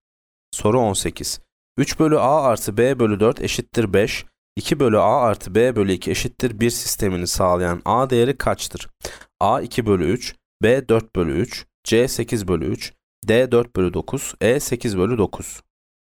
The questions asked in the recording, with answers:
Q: 2 bölü A artı B bölü 2 eşittir 1 sistemini sağlayan A değeri kaçtır?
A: Yanıt D. 4 bölü 9.